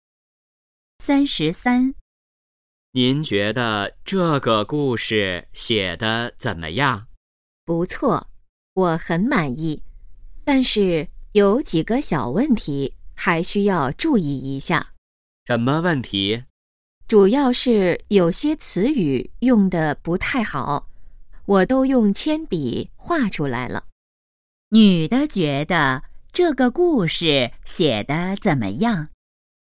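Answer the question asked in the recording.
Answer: 不错,很满意,但有几个小问题(有些词语用得不太好)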